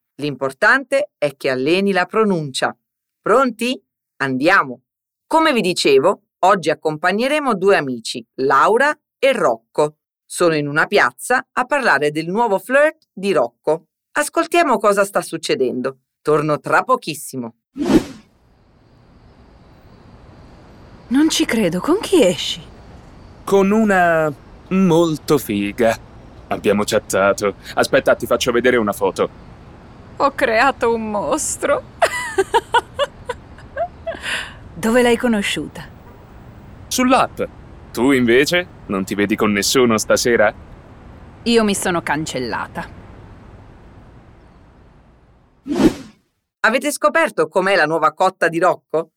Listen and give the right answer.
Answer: E lui risponde vivamente con una molto figa.